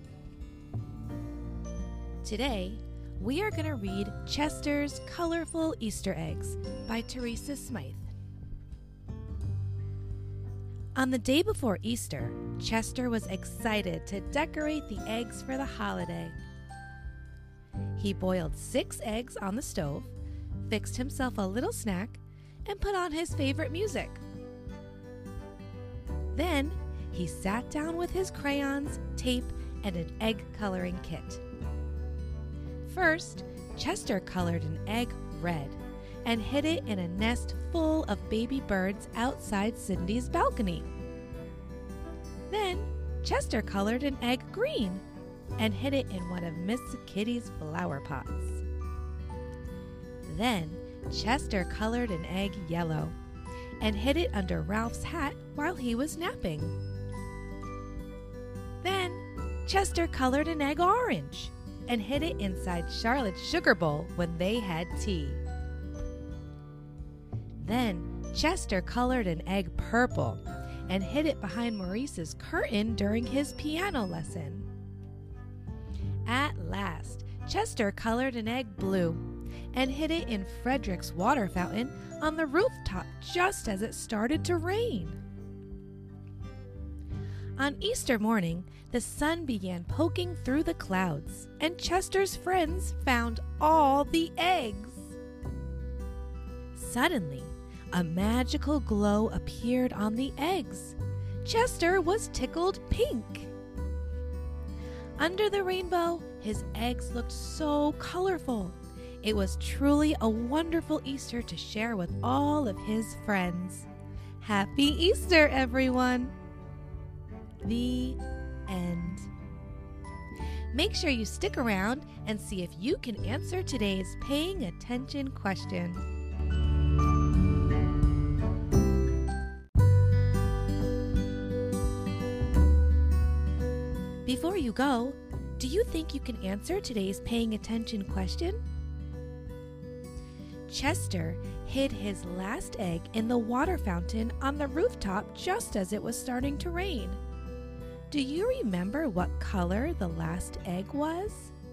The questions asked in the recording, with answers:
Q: Do you remember what color the last egg was?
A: If your answer was blue, great job!